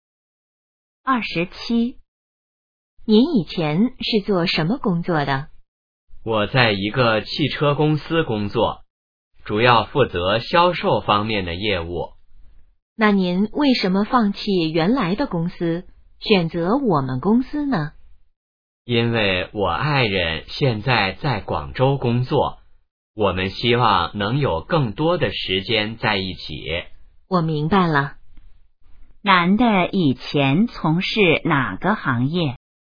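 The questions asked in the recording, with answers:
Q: 男的以前从事哪个行业?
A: 汽车行业(销售)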